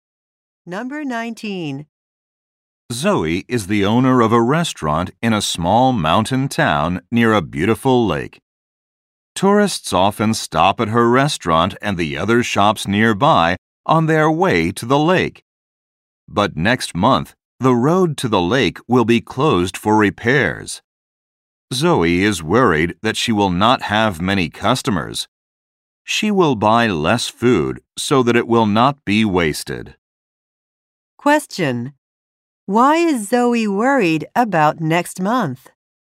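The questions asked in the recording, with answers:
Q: Why is Zoe worried about next month?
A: The road to the lake will be closed, so she may have few customers.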